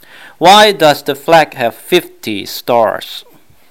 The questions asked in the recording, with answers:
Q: Why does the flag have 50 stars?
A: 答案是 because there is one star for each state。